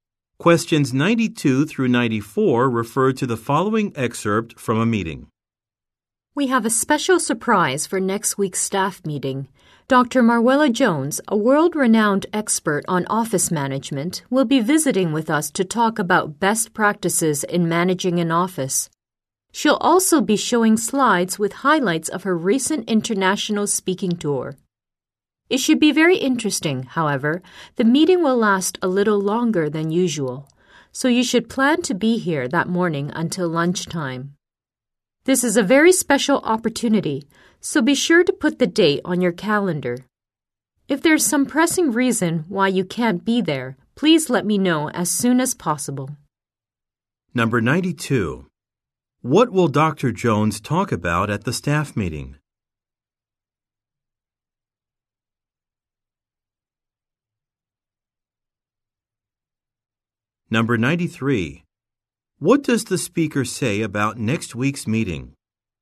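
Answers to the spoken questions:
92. Best practices in managing an office
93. It will last longer than usual, until lunchtime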